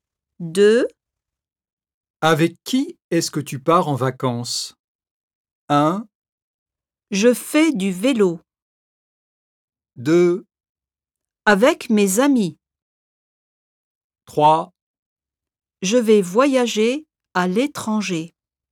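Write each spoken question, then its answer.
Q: Avec qui est-ce que tu pars en vacances?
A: 2: Avec mes amis.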